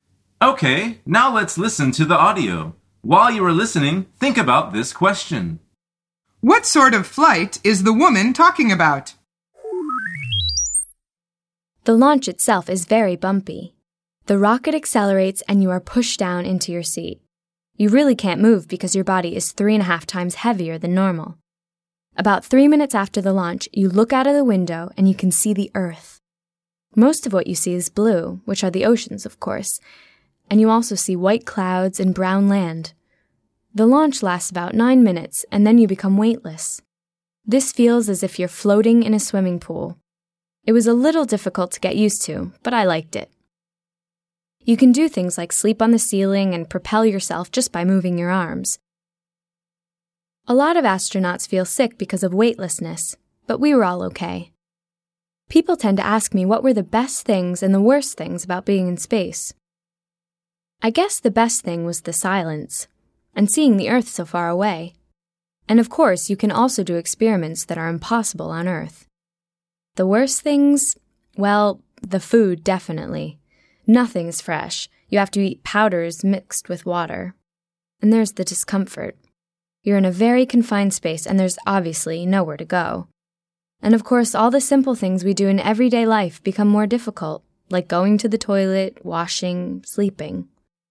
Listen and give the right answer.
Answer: The answer is a rocket flight into space.